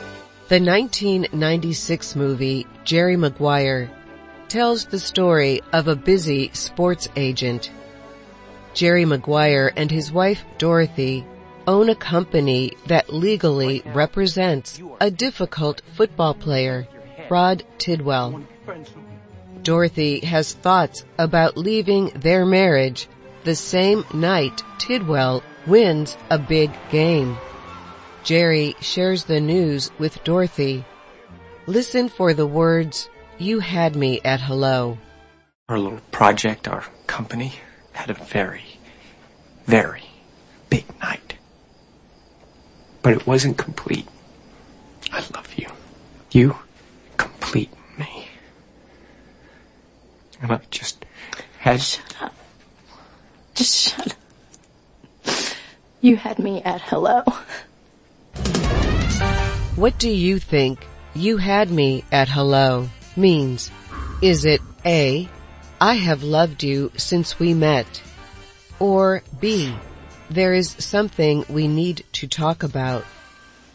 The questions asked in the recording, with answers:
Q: What do you think you had me at hello means?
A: The answer is A. I have loved you since we met.